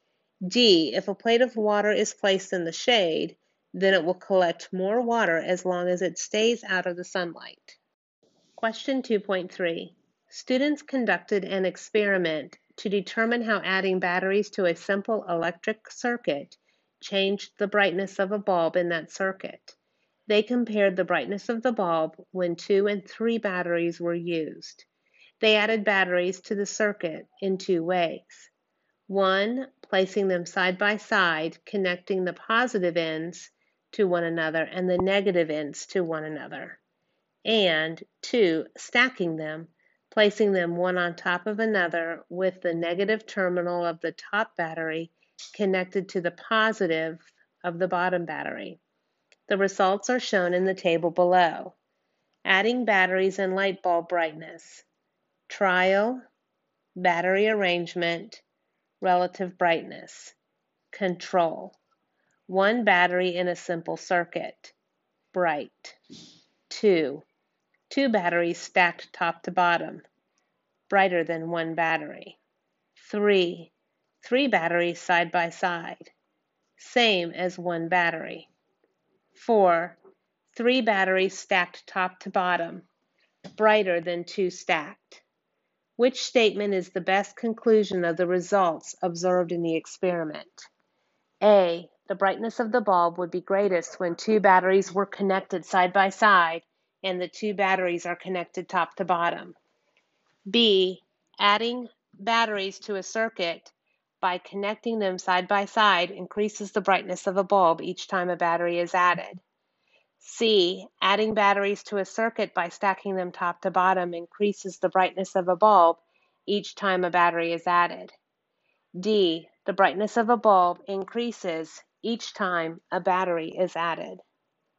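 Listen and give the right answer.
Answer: C: Adding batteries to a circuit by stacking them top to bottom increases the brightness of a bulb each time a battery is added.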